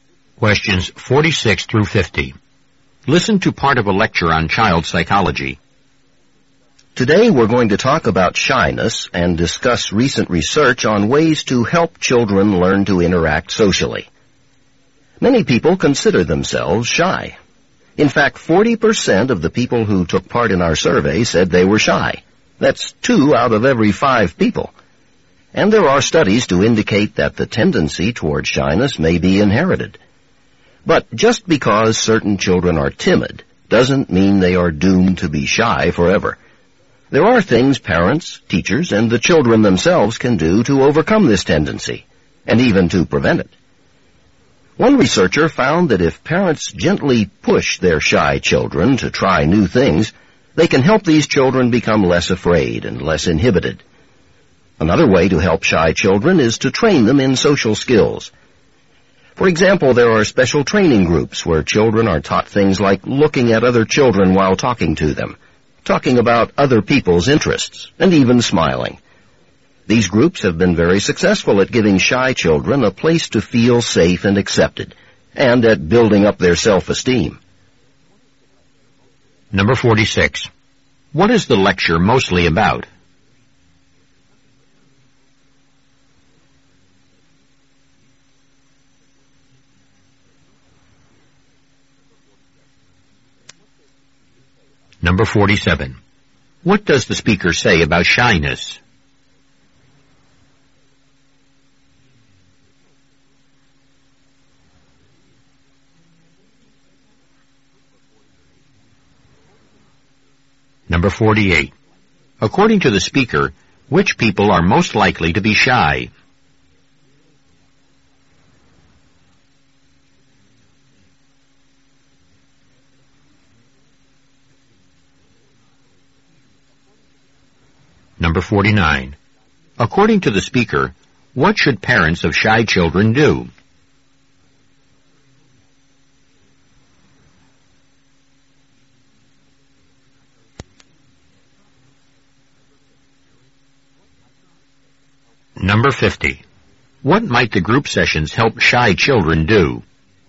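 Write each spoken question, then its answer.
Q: What is the lecture mostly about?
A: Ways to help children overcome shyness

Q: According to the speaker, what should parents of shy children do?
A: Gently push them to try new things

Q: What might the group sessions help shy children do?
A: Learn social skills and build self-esteem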